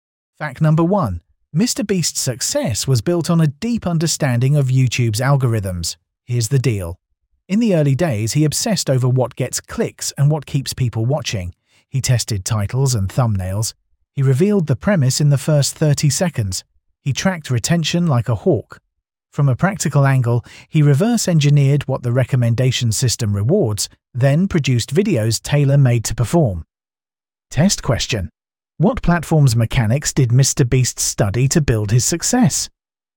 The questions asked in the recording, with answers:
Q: What platform's mechanics did MrBeast study to build his success?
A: Correct answer, YouTube.